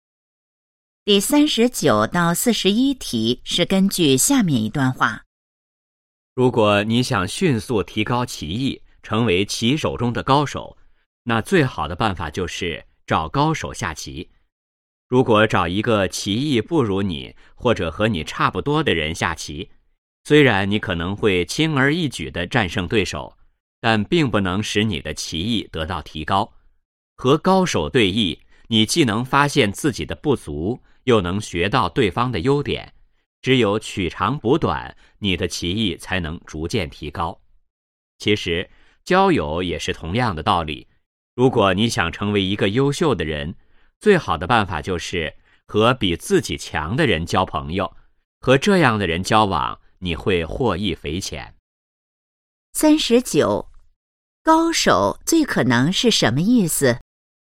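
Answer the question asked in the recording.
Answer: 技艺水平很高的人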